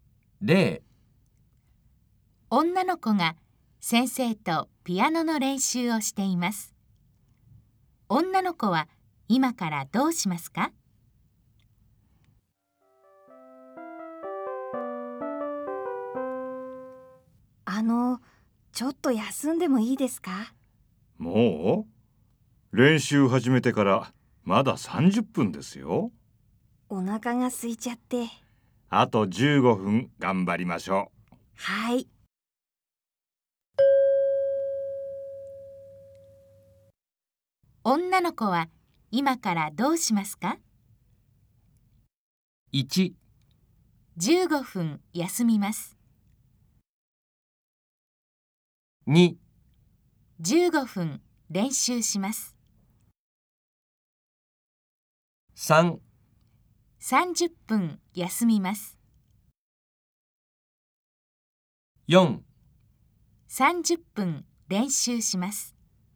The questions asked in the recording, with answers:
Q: 女の子は今からどうしますか?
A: 正しい答えは2です。